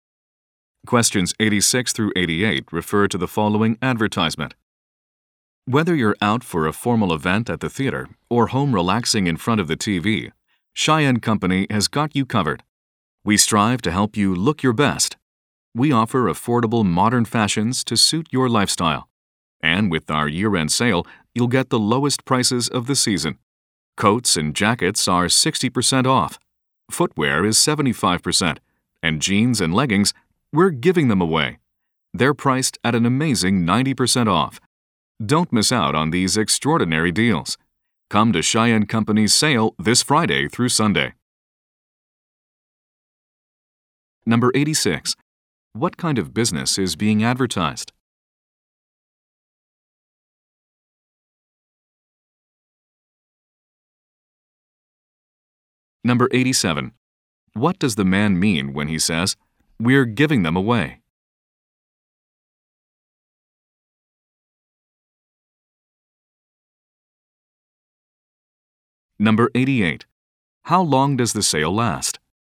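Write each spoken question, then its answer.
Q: What kind of business is being advertised?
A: A clothing store

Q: What does the man mean when he says, "We're giving them away"?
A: The jeans and leggings are extremely cheap (90% off)

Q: How long does the sale last?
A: Three days (Friday through Sunday)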